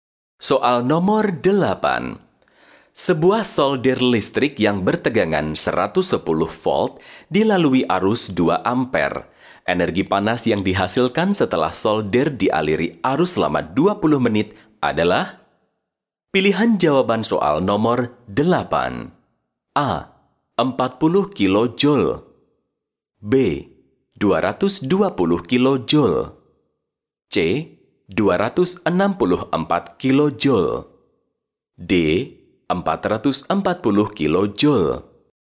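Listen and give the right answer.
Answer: C: 264 kilojoule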